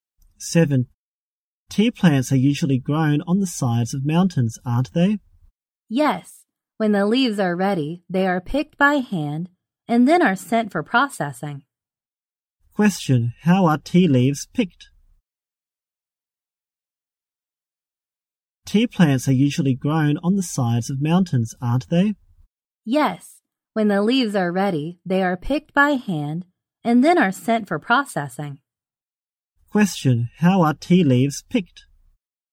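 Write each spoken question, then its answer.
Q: Question. How are tea leaves picked?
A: By hand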